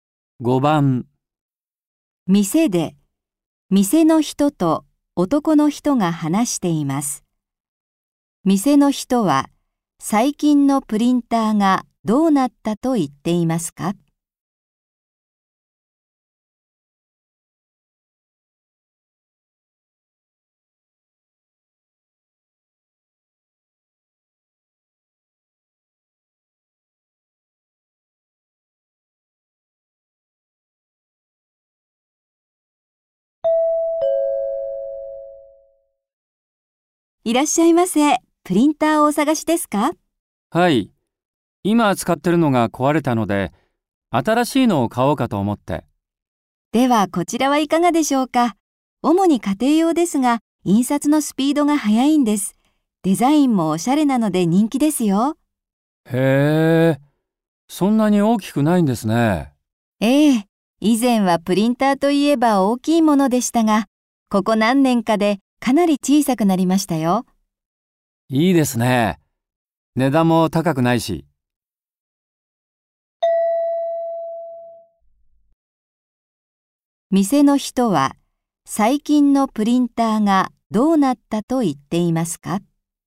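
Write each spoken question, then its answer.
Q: 店の人は最近のプリンターがどうなったと言っていますか?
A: かなり小さくなった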